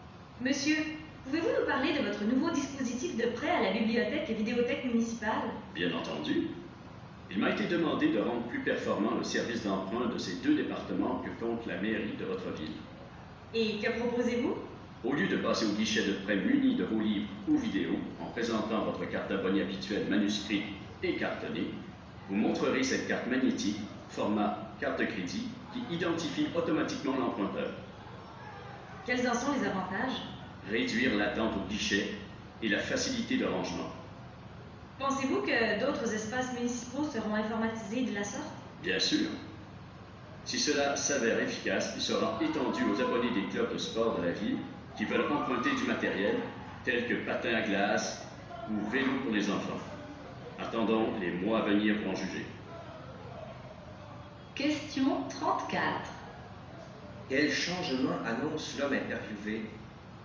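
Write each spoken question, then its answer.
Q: Quel changement annonce l'homme interviewé?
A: Une carte magnétique (format carte de crédit) remplacera la carte d'abonné cartonnée pour emprunter à la bibliothèque et vidéothèque.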